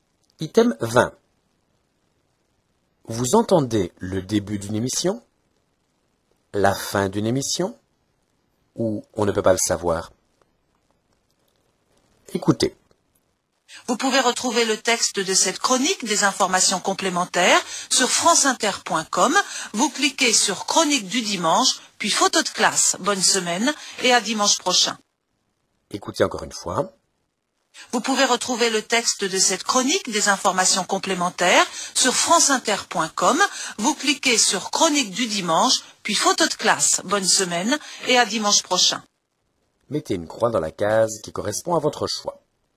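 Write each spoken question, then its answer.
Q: Vous entendez le début d'une émission, la fin d'une émission, ou on ne peut pas le savoir.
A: la fin d'une émission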